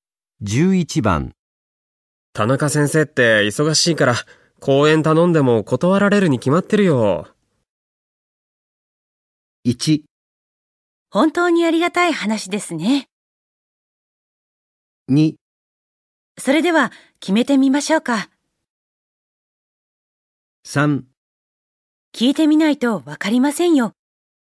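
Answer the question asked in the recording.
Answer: 3: 聞いてみないとわかりませんよ。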